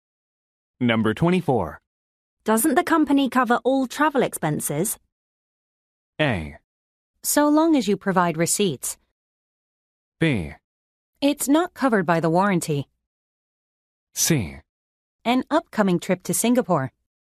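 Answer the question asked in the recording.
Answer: A: So long as you provide receipts.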